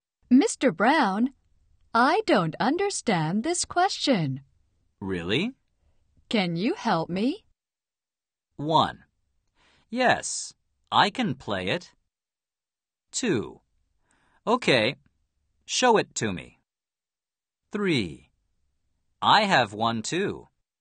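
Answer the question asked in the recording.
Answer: 2: Okay, show it to me.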